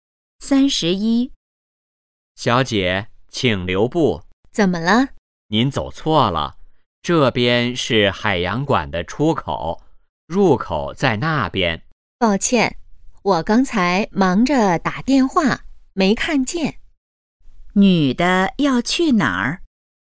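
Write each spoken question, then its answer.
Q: 女的要去哪儿?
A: 海洋馆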